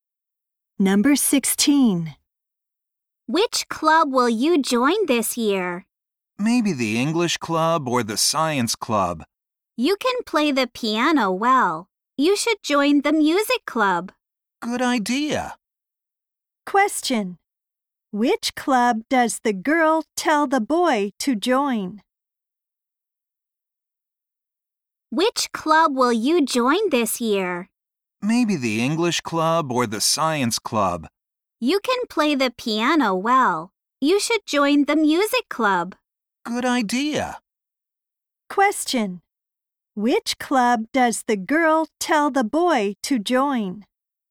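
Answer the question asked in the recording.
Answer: The music club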